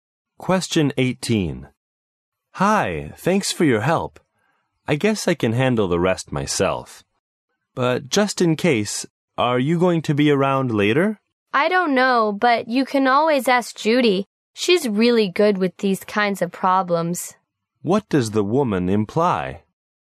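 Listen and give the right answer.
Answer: Judy can help the man if he has problems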